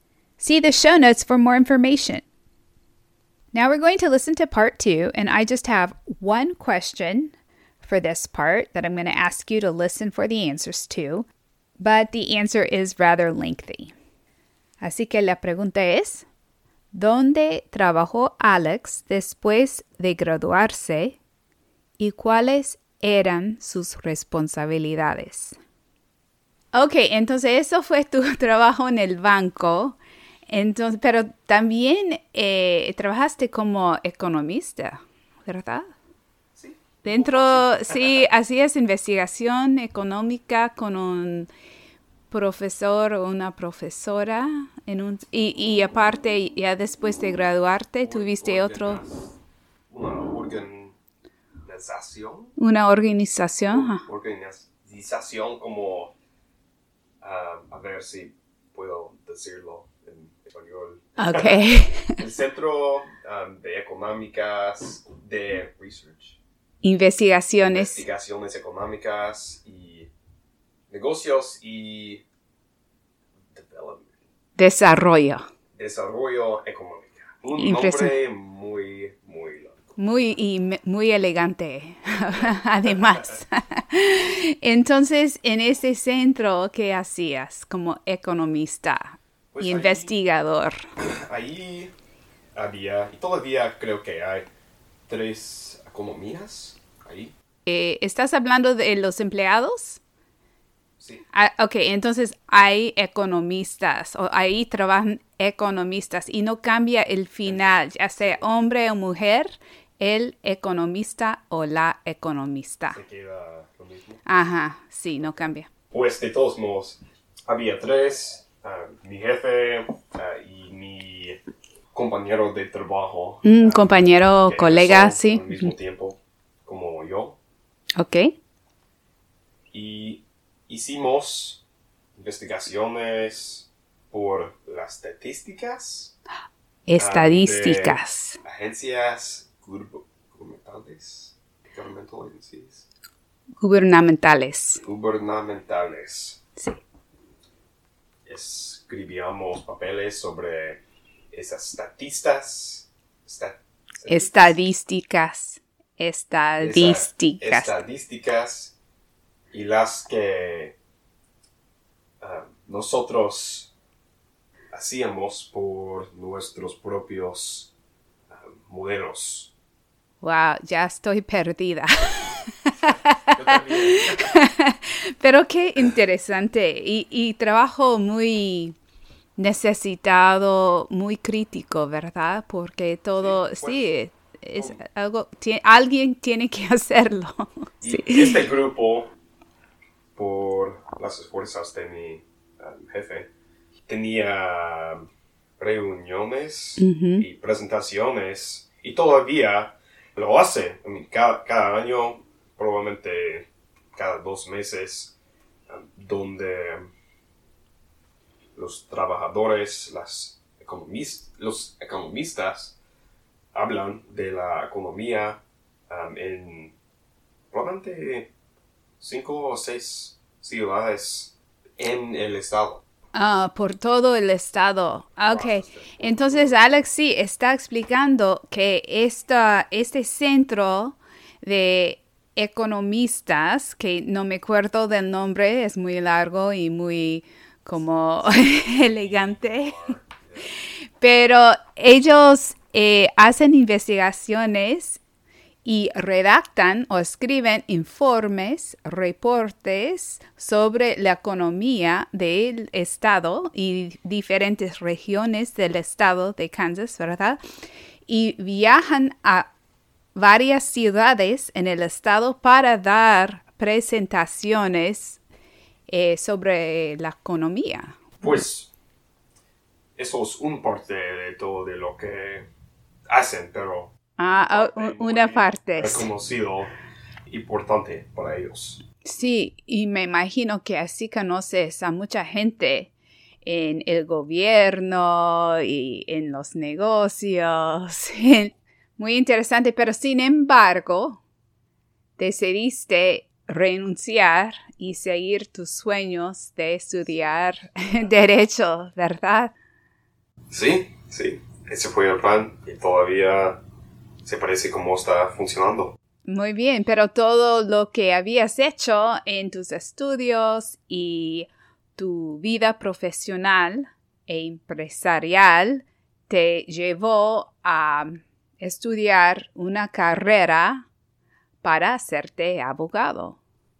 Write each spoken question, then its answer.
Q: ¿dónde trabajó Alex después de graduarse y cuáles eran sus responsabilidades?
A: Y la respuesta es, Alex trabajó como economista en un centro de desarrollo económico e investigación comercial.